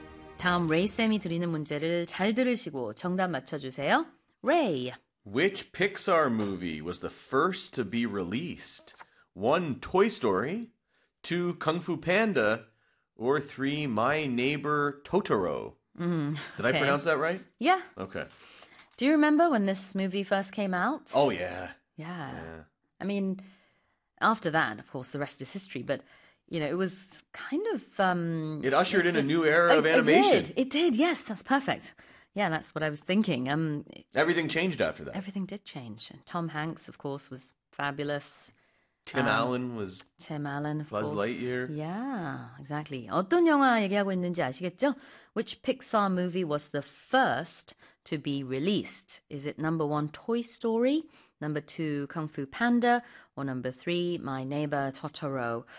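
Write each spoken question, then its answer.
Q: Which Pixar movie was the first to be released?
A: 1: Toy Story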